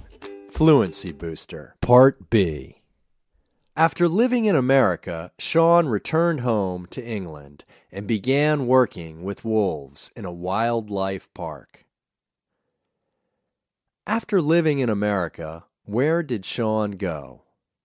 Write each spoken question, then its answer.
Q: After living in America, where did Sean go?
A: After living in America, Sean returned to England.